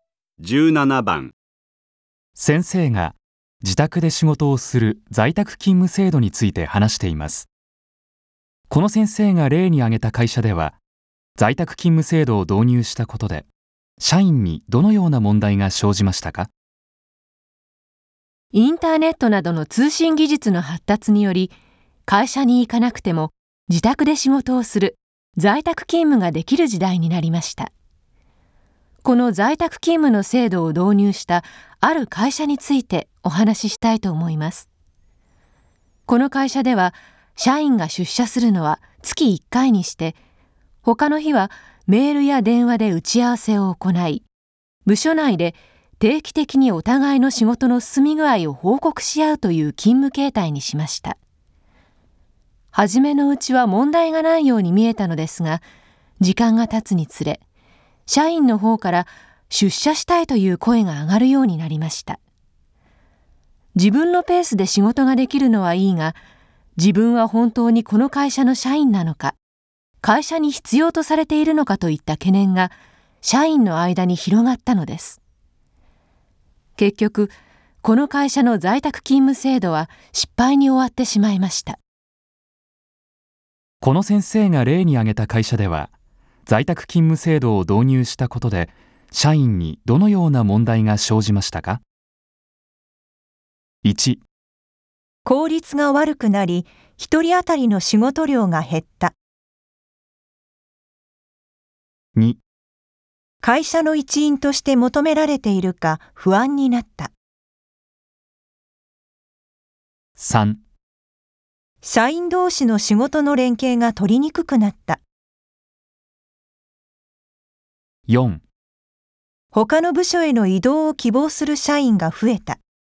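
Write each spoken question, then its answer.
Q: この先生が例に挙げた会社では在宅勤務制度を導入したことで社員にどのような問題が生じましたか?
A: 2: 会社の一員として求められているか不安になった。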